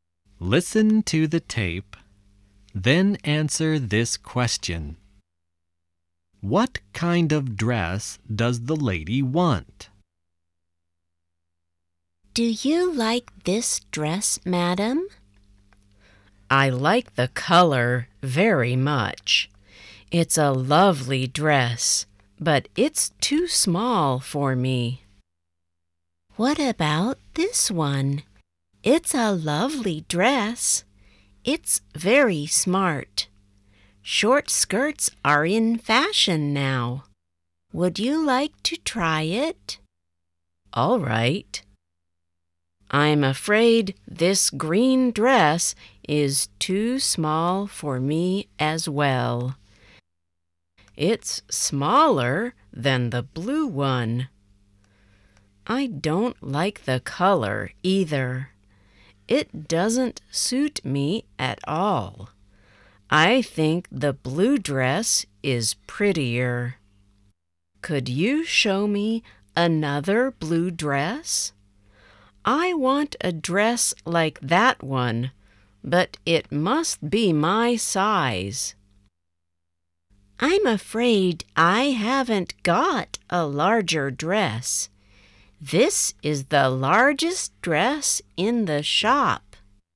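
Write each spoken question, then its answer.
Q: What kind of dress does the lady want?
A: A blue dress like the first one, but in her size (a larger one)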